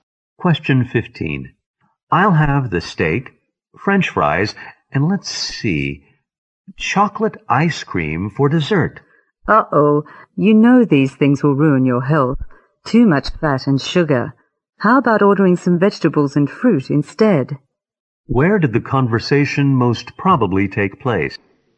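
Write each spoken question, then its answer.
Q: Where did the conversation most probably take place?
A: In a restaurant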